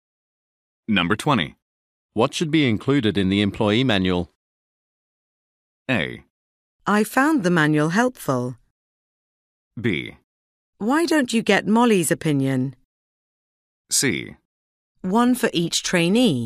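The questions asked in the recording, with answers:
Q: What should be included in the employee manual?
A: B: Why don't you get Molly's opinion?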